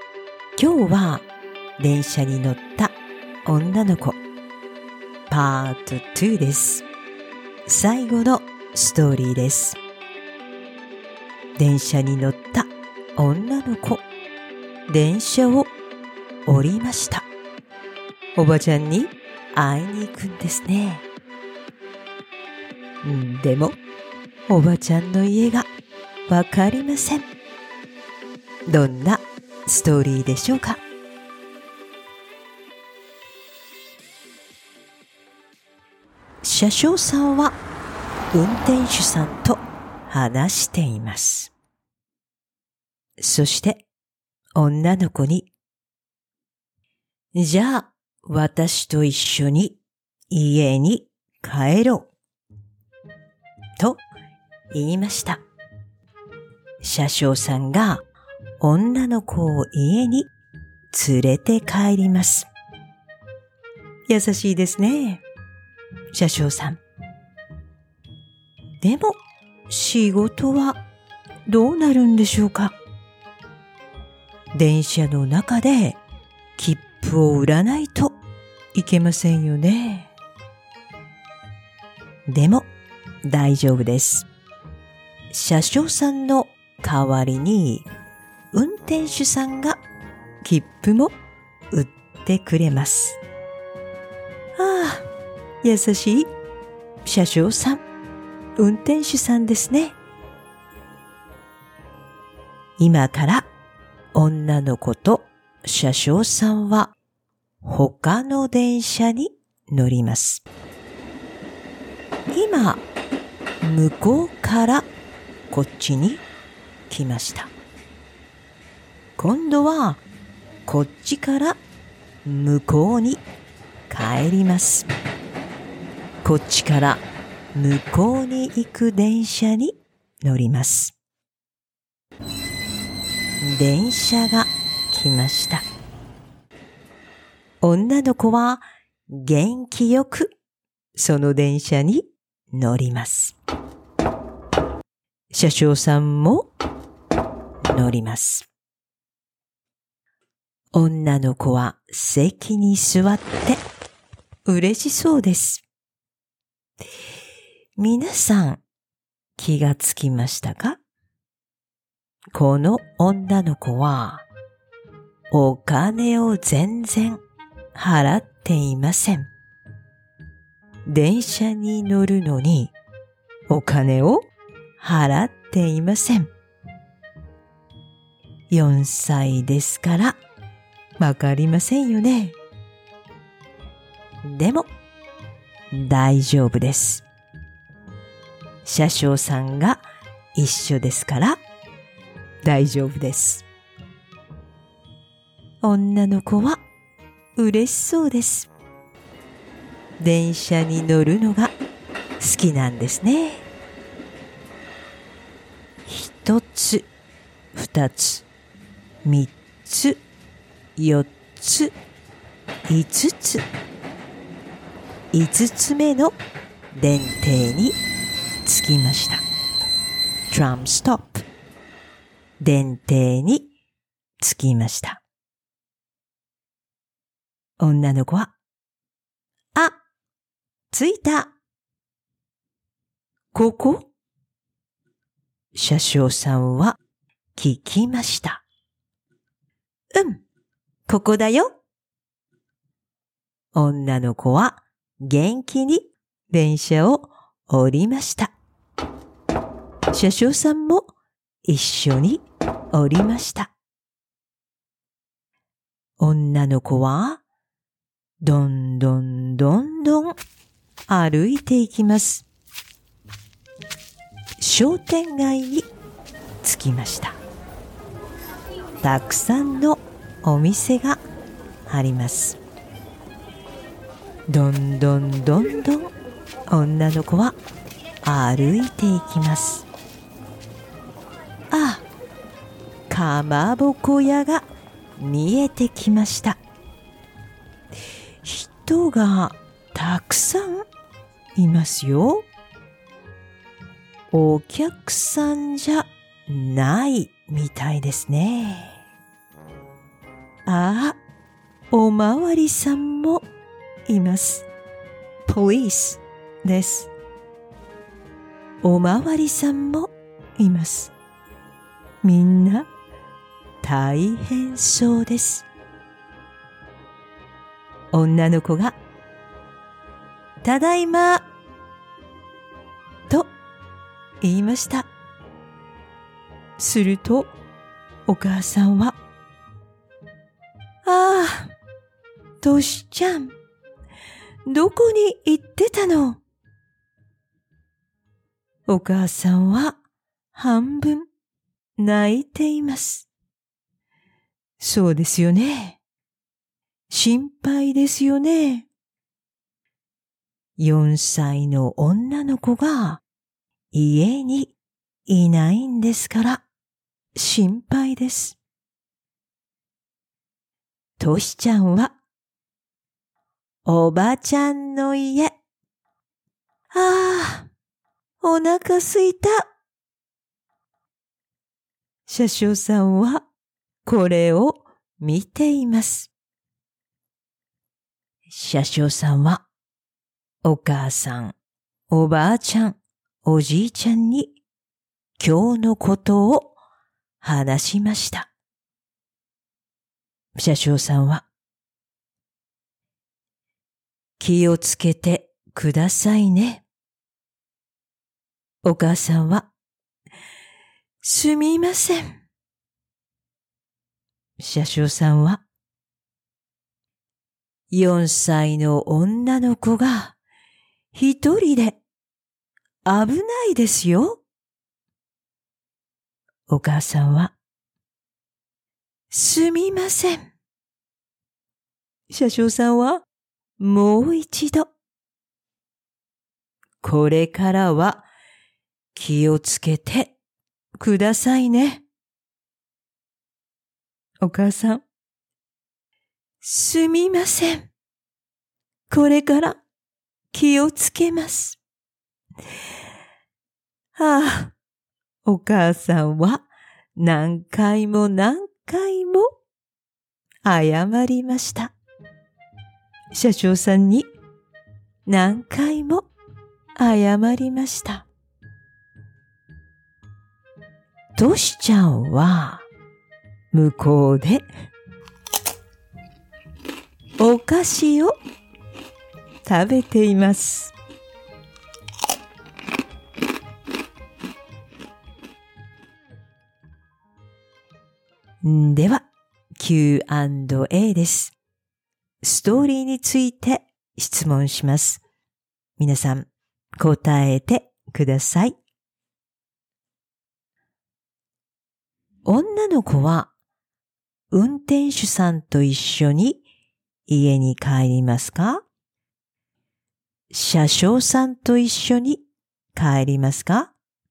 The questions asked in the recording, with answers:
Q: 女の子は運転手さんと一緒に家に帰りますか?車掌さんと一緒に帰りますか?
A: 車掌さんと一緒に帰ります。